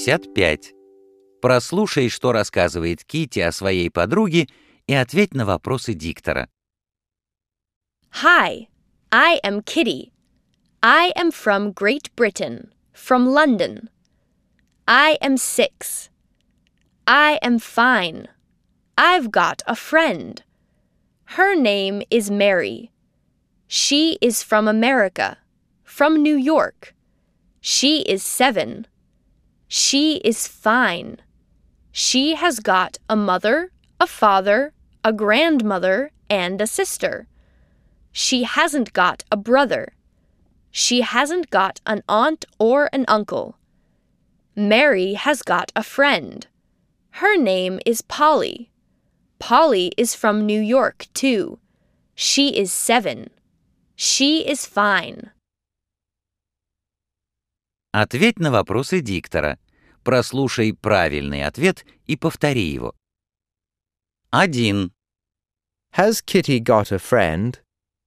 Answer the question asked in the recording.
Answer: Yes, she has.